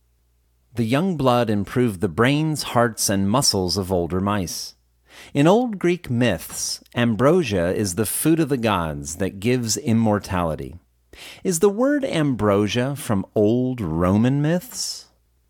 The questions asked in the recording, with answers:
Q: Is the word ambrosia from old Roman myths?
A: No, the word ambrosia is not from old Roman myths.